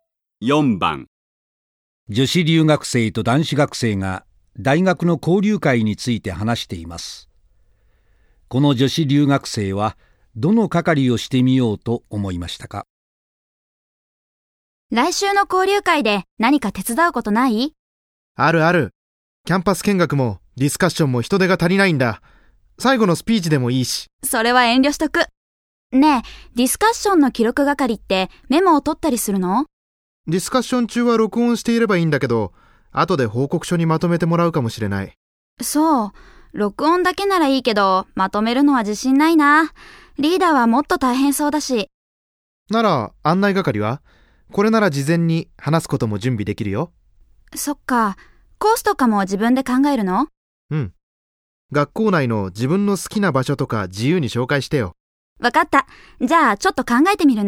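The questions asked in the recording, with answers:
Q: この女子留学生はどの係をしてみようと思いましたか?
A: キャンパス見学の案内係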